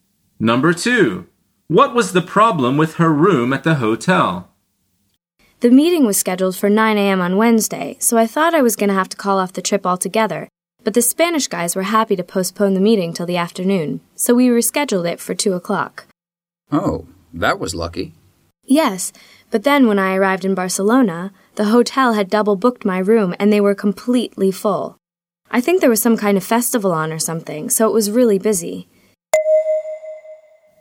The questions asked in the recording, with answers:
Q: What was the problem with her room at the hotel?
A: The answer is it had been double booked.